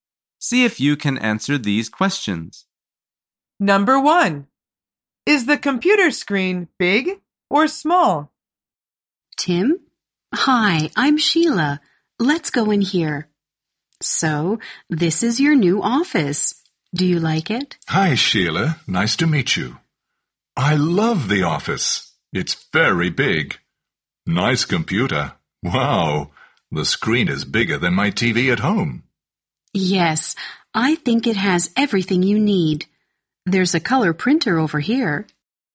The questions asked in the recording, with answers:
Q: Is the computer screen big or small?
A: The answer is big.